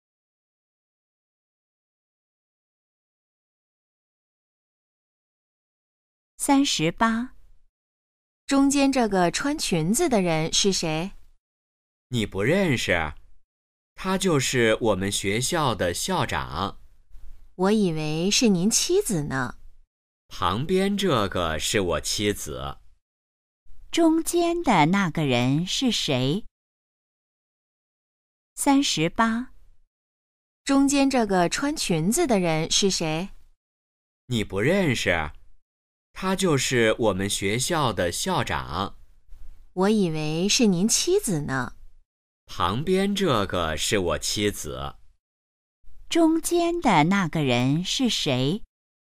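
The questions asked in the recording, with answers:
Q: 中间的那个人是谁?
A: 学校的校长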